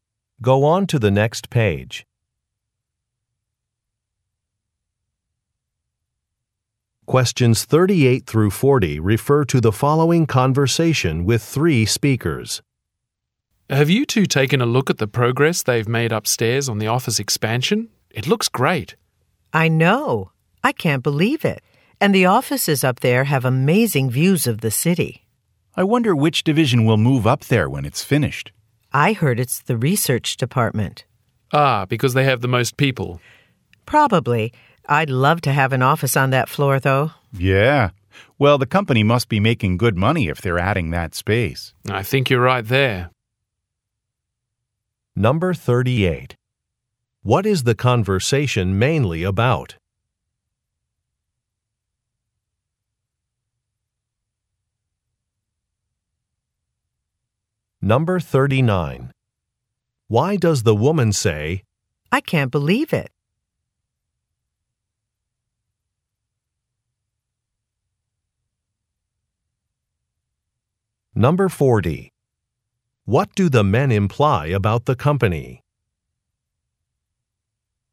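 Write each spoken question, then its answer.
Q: What is the conversation mainly about?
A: The office expansion upstairs

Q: What do the men imply about the company?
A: It is making good money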